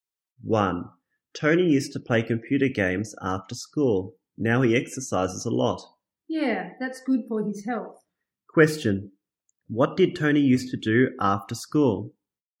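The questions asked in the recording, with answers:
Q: What did Tony used to do after school?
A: Play computer games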